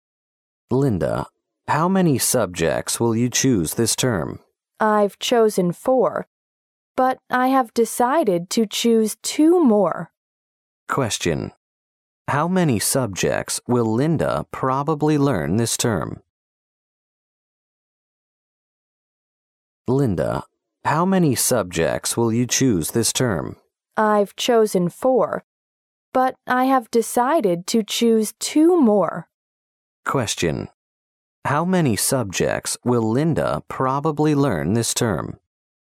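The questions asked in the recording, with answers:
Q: How many subjects will Linda probably learn this term?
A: Six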